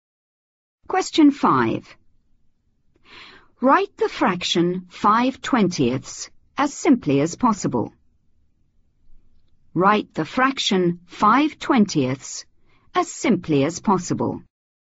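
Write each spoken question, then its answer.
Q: Write the fraction 5/20 as simply as possible.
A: 1/4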